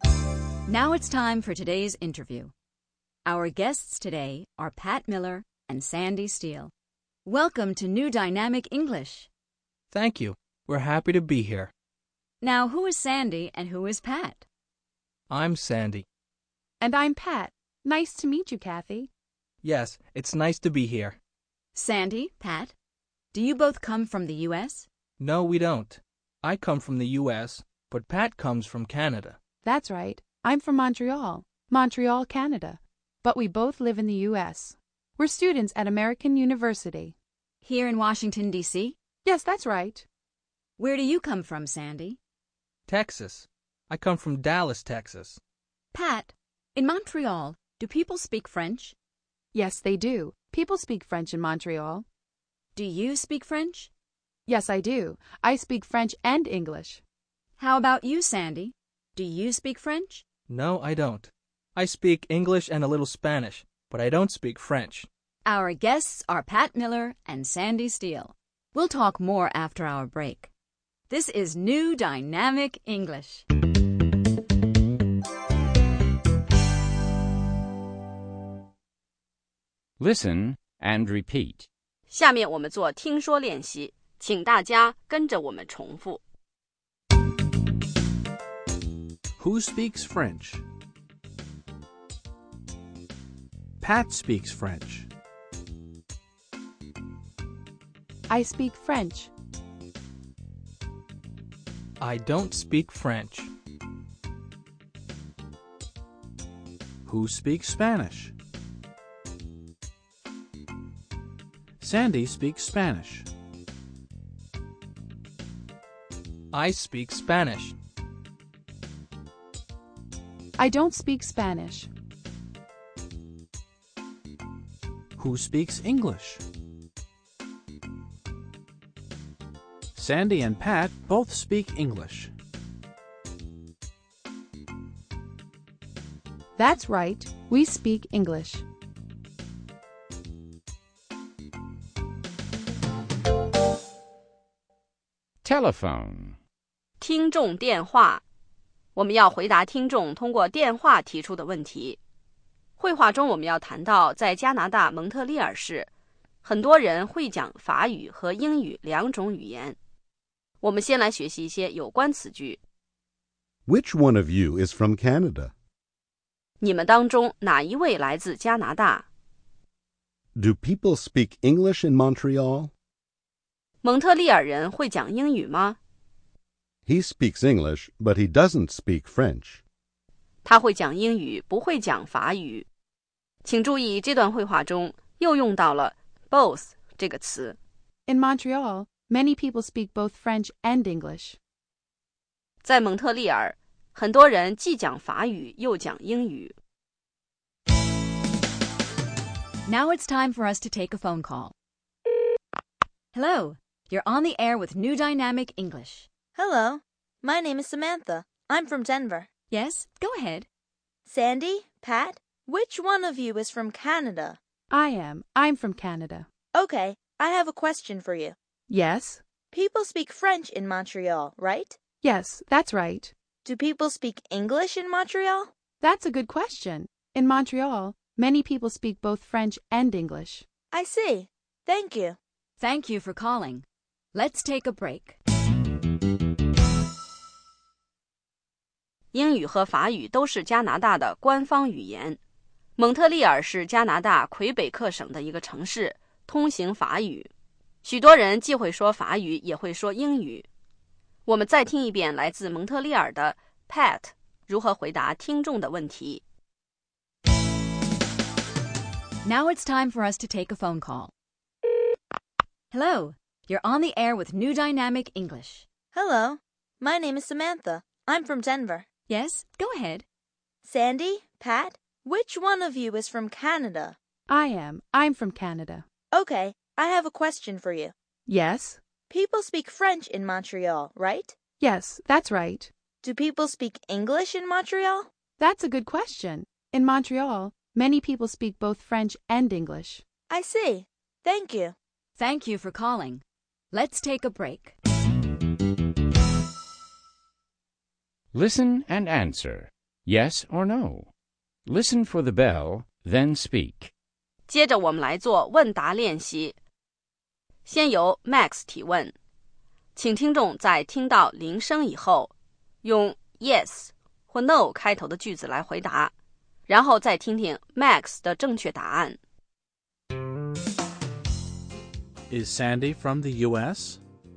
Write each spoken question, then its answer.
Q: Is Sandy from the U.S.?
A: Yes, he is. He's from the U.S.